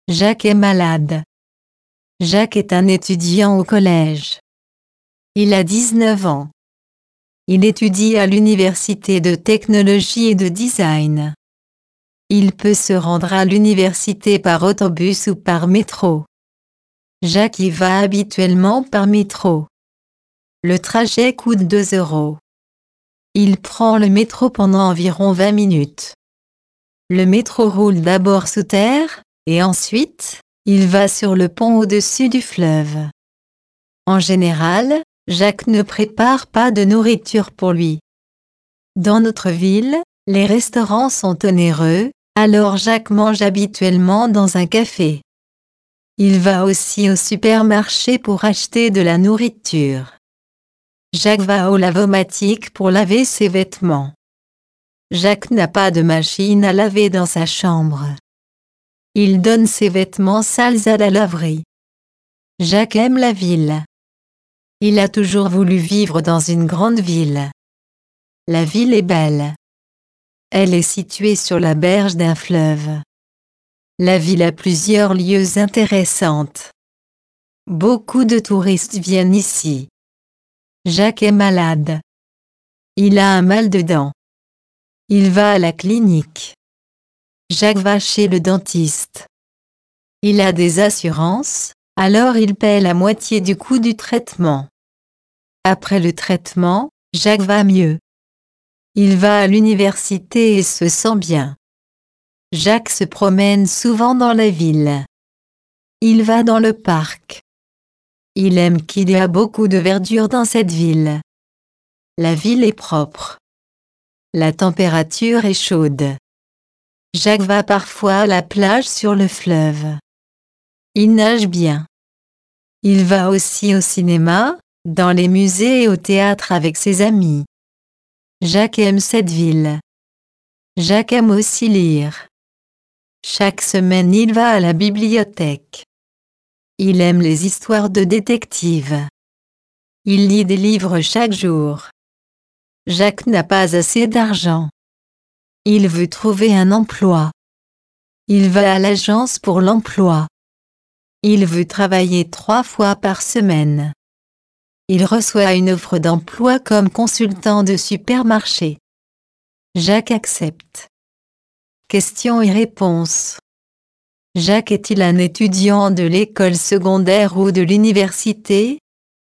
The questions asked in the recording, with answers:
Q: Jacques est-il un étudiant de l'école secondaire ou de l'université?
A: Jacques est un étudiant à l'université.